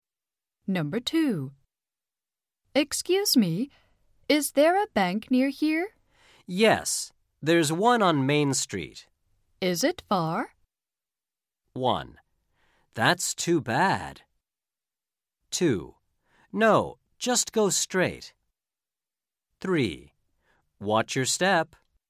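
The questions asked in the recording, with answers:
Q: Is it far?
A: 2: No, just go straight.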